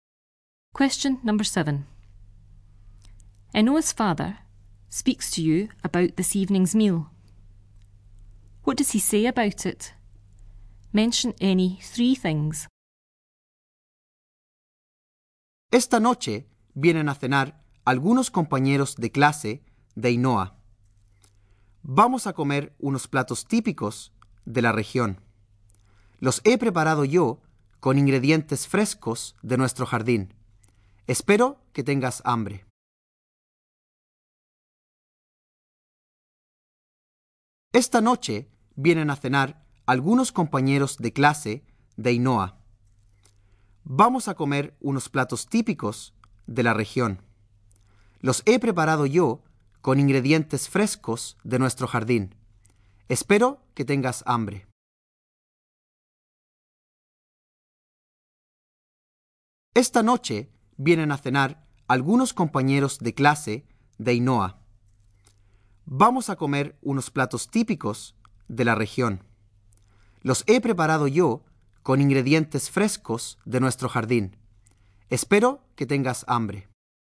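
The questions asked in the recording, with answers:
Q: What does he say about it?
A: Some of Enoa's classmates are coming to dinner; typical regional dishes; he made them himself with fresh ingredients from the garden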